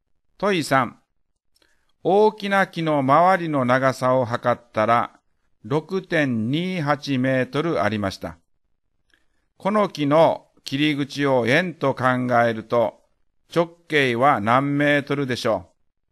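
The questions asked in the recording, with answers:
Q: この木の切り口を円と考えると直径は何メートルでしょう。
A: 2メートル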